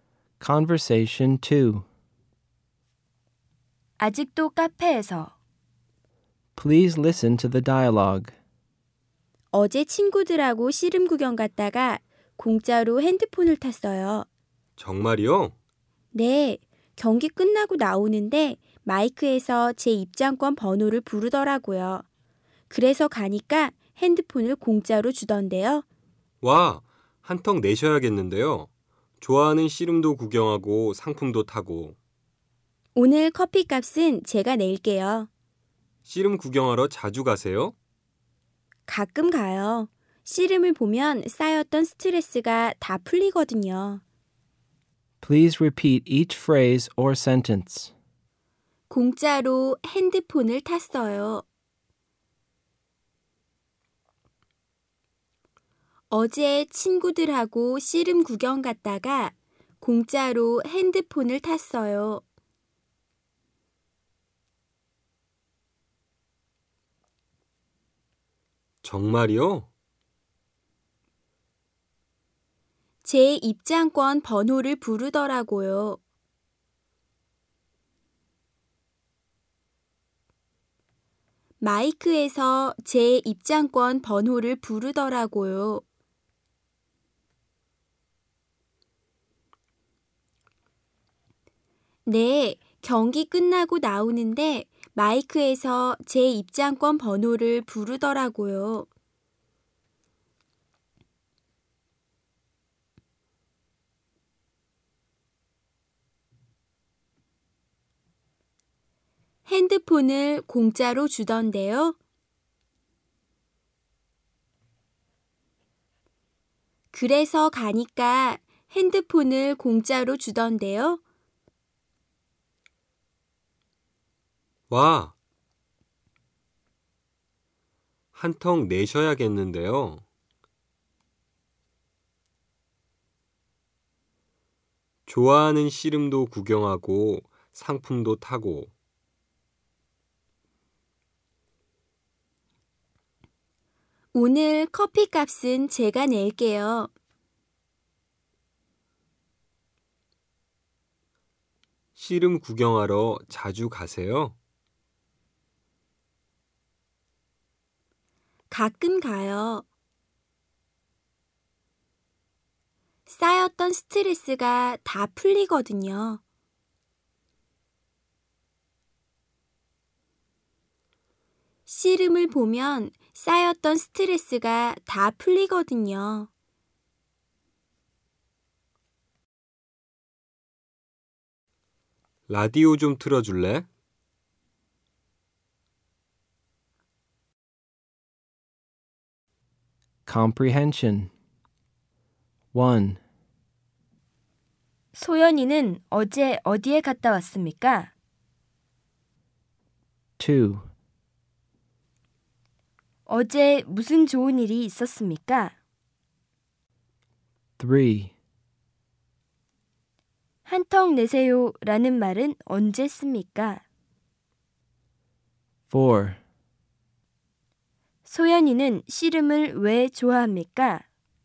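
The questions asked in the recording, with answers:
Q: 소연이는 어제 어디에 갔다 왔습니까?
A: 친구들하고 씨름 구경을 갔다 왔습니다.

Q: 어제 무슨 좋은 일이 있었습니까?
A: 씨름 경기장에서 입장권 번호가 뽑혀서 핸드폰을 공짜로 탔습니다.

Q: 소연이는 씨름을 왜 좋아합니까?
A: 씨름을 보면 쌓였던 스트레스가 다 풀리기 때문입니다.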